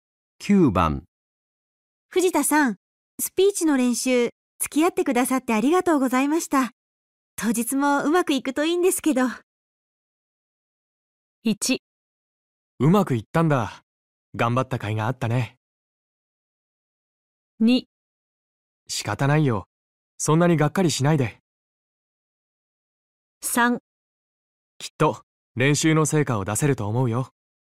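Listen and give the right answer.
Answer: 3: きっと練習の成果を出せると思うよ。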